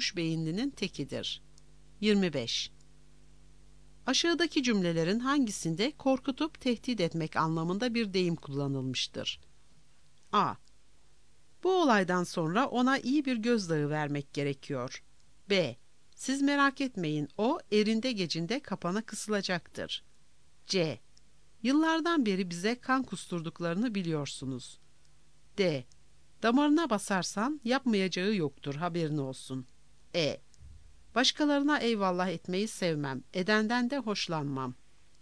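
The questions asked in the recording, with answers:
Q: Aşağıdaki cümlelerin hangisinde korkutup tehdit etmek anlamında bir deyim kullanılmıştır?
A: A: Bu olaydan sonra ona iyi bir gözdağı vermek gerekiyor.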